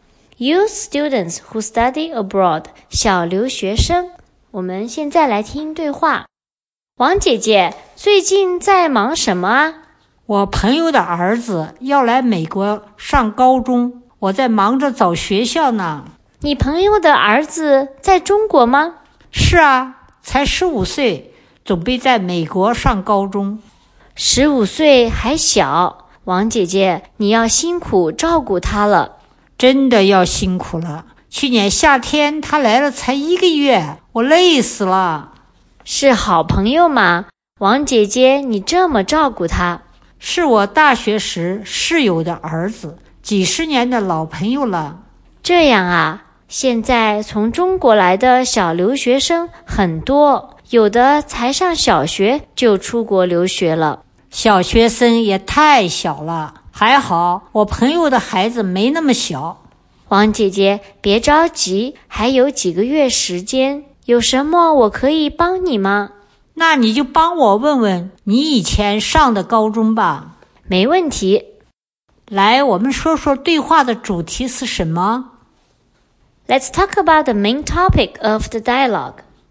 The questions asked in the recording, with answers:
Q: 来,我们说说对话的主题是什么?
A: 我觉得主题是王姐姐帮朋友的儿子联系在美国读高中。